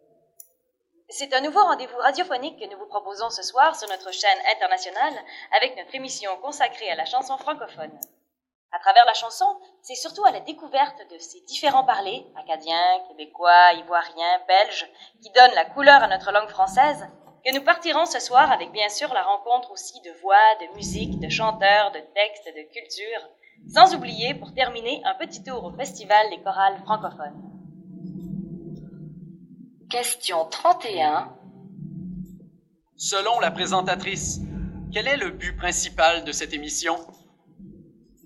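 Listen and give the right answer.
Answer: Faire découvrir les différents parlers francophones à travers la chanson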